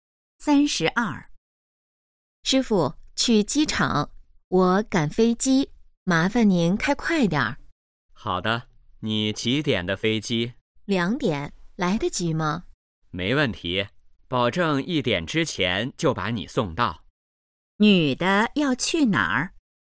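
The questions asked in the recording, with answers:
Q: 女的要去哪儿?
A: 机场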